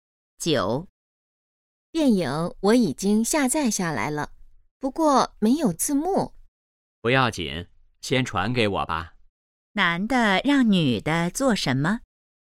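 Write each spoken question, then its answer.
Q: 男的让女的做什么?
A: 先把电影传给他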